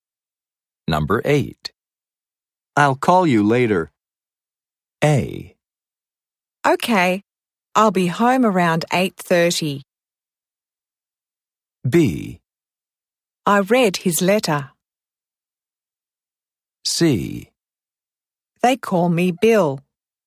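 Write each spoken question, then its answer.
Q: I'll call you later.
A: A: Okay, I'll be home around 8:30.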